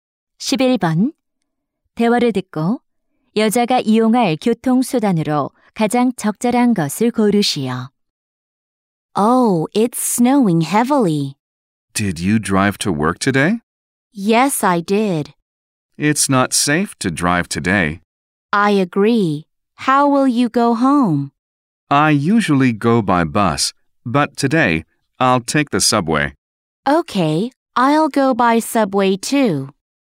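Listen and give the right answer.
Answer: 지하철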